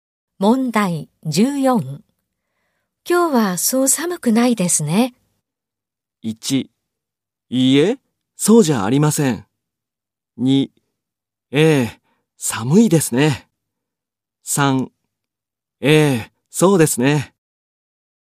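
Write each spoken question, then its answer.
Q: 今日はそう寒くないですね。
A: 2: ええ、そうですね。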